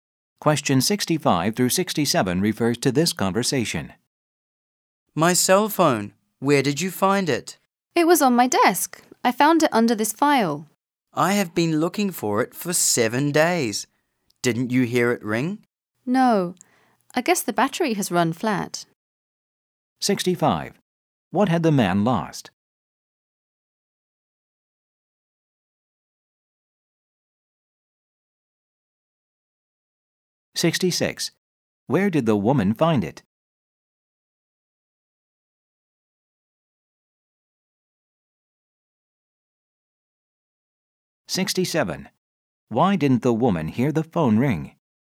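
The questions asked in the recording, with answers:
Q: What had the man lost?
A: His cell phone

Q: Where did the woman find it?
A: On her desk, under a file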